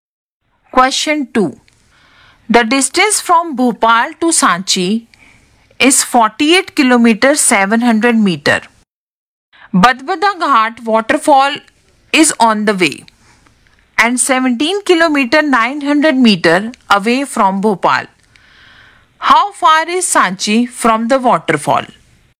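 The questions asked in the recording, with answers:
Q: How far is Sanchi from the waterfall?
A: 30 km 800 meter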